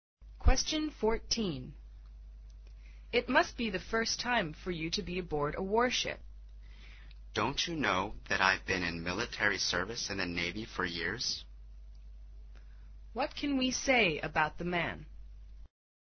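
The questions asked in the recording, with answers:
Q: What can we say about the man?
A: He has served in the Navy for years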